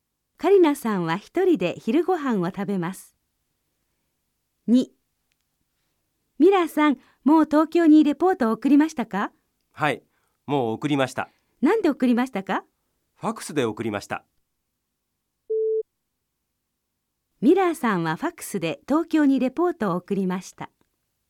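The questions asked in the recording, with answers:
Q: ミラーさんはファックスで東京にレポートを送りました。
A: ○(はい)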